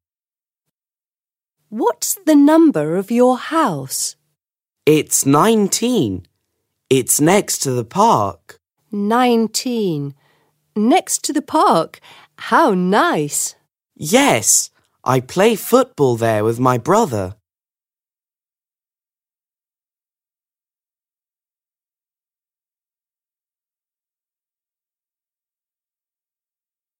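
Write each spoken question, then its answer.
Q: What's the number of your house?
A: 19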